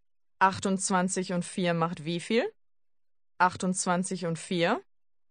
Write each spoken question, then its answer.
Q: 28 und 4 macht wie viel?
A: 32. 32.